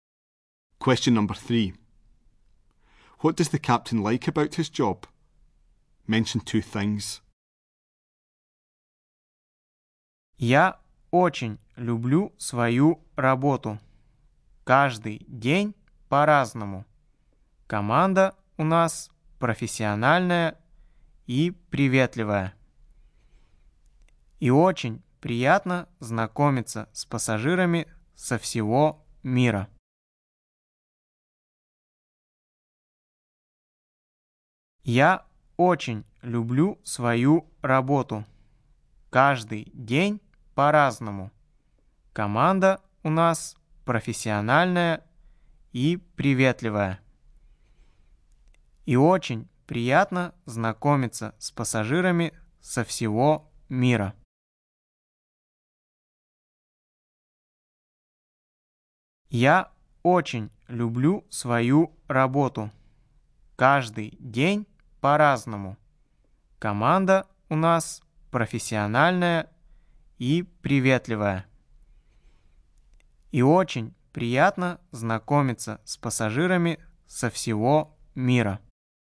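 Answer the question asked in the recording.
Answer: Every day is different; the crew is professional and friendly; meeting passengers from all over the world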